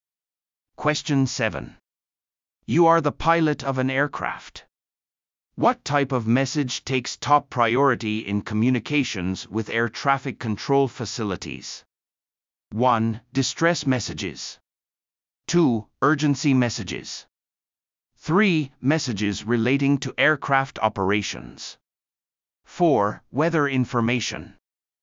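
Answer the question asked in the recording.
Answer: 1: Distress messages.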